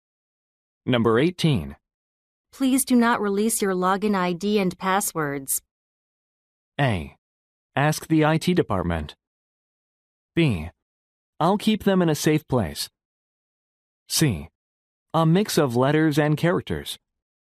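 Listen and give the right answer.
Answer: B: I'll keep them in a safe place.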